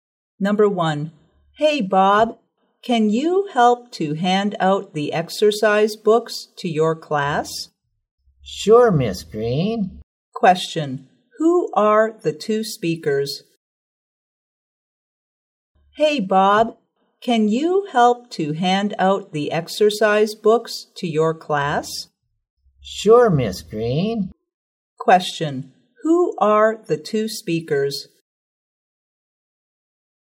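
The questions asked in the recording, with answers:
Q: who are the two speakers?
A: A teacher (Miss Green) and a student (Bob)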